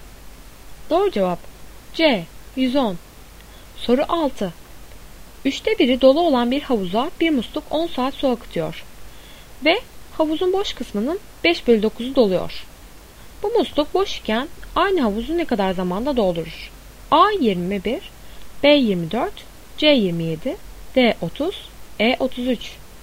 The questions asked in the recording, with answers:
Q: Bu musluk boş iken aynı havuzu ne kadar zamanda doldurur?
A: Doğru cevap C 27.